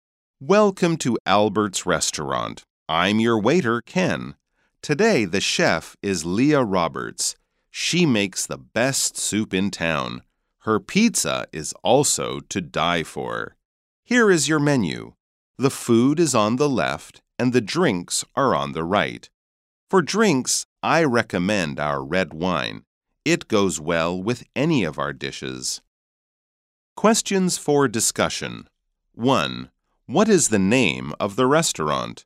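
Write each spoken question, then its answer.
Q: What is the name of the restaurant?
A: Albert's restaurant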